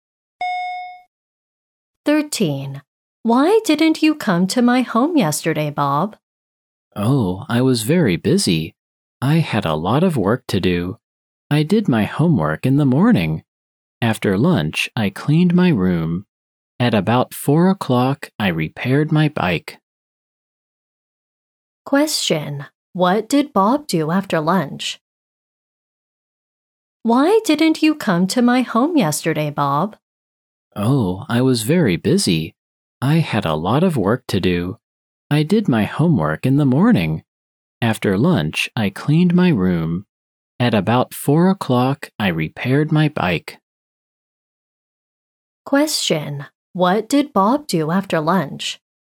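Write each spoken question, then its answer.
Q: What did Bob do after lunch?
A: He cleaned his room.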